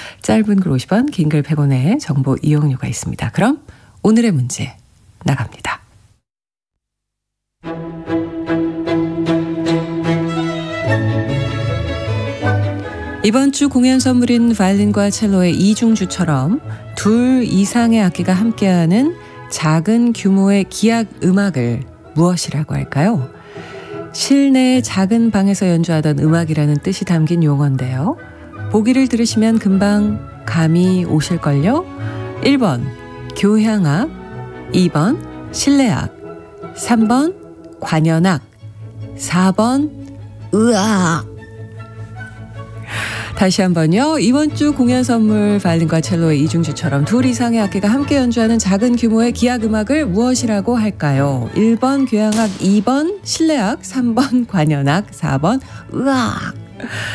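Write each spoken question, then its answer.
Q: 이번 주 공연 선물인 바이올린과 첼로의 이중주처럼 둘 이상의 악기가 함께하는 작은 규모의 기악 음악을 무엇이라고 할까요?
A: 2번: 실내악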